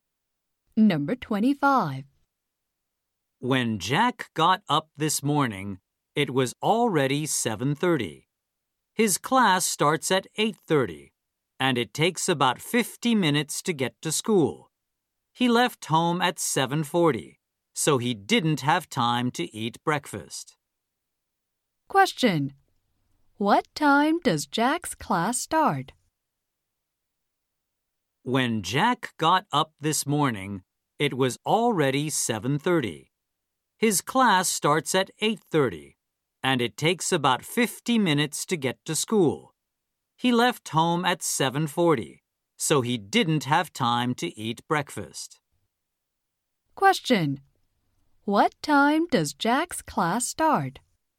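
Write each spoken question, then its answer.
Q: What time does Jack's class start?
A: At 8:30.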